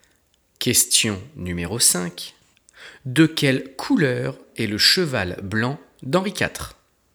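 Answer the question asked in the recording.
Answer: blanc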